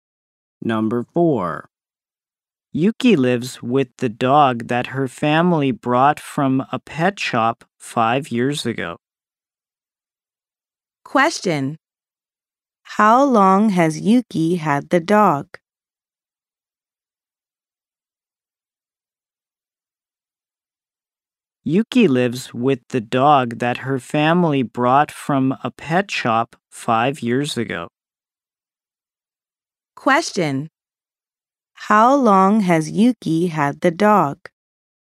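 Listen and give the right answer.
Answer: For 5 years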